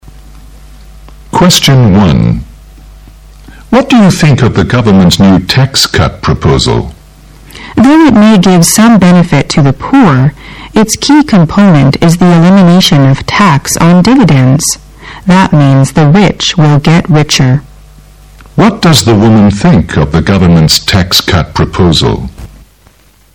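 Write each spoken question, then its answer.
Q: What does the woman think of the government's tax cut proposal?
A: It mainly benefits the rich, who will get richer.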